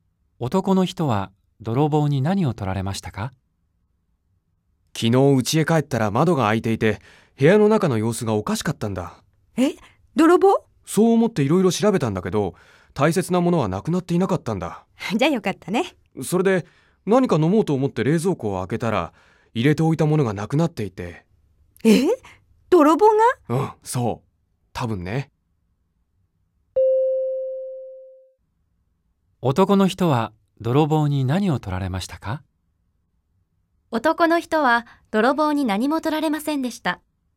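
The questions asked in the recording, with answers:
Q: 男の人は泥棒に何も取られませんでした。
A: ×(冷蔵庫に入れておいたものを取られた)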